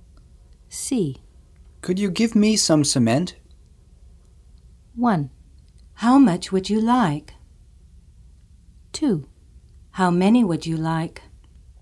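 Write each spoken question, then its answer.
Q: Could you give me some cement?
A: 1: How much would you like?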